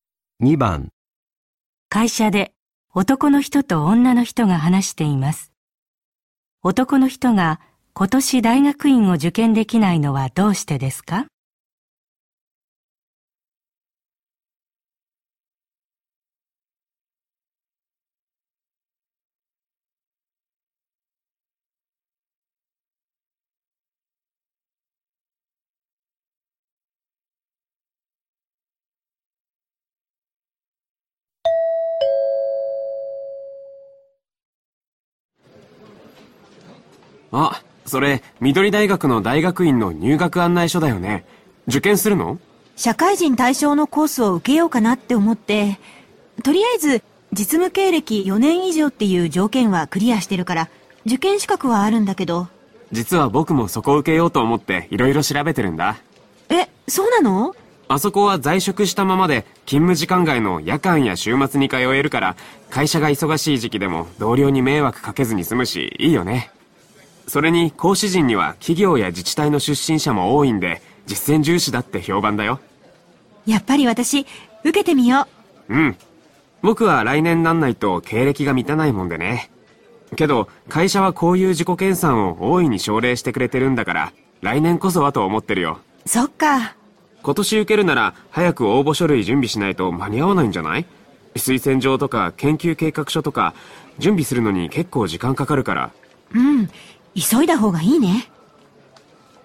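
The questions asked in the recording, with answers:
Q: 男の人が今年大学院を受験できないのはどうしてですか?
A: 実務経歴が4年に満たないから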